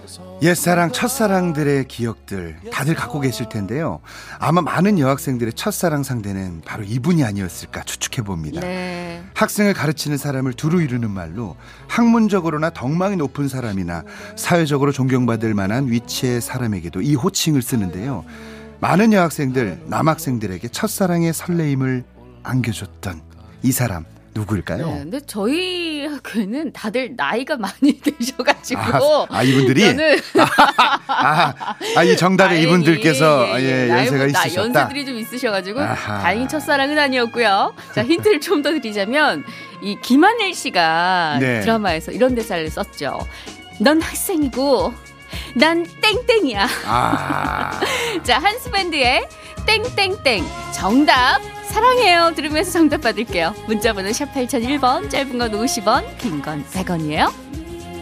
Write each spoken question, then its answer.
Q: 많은 여학생들, 남학생들에게 첫사랑의 설레임을 안겨줬던 이 사람 누구일까요?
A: 선생님이었습니다.